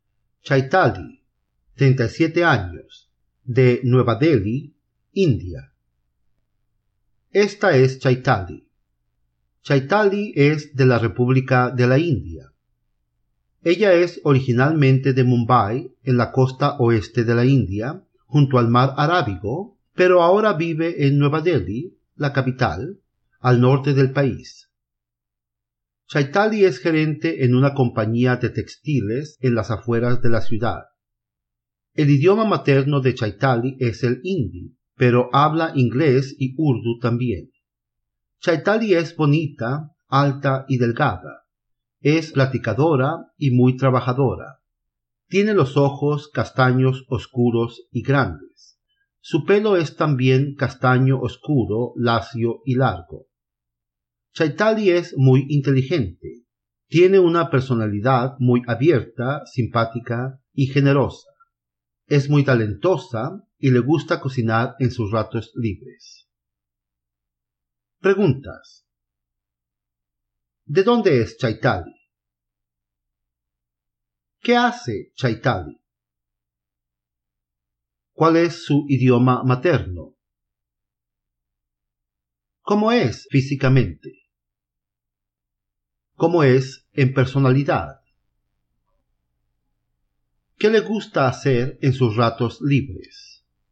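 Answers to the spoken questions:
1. De la India, originalmente de Mumbai; ahora vive en Nueva Delhi
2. Es gerente en una compañía de textiles
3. El hindi
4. Bonita, alta y delgada, con ojos castaños oscuros y grandes y pelo castaño oscuro, lacio y largo
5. Platicadora, trabajadora, inteligente, abierta, simpática y generosa
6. Cocinar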